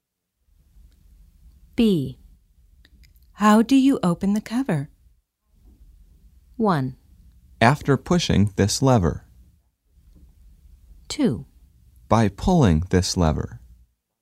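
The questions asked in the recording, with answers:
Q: How do you open the cover?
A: 2: By pulling this lever.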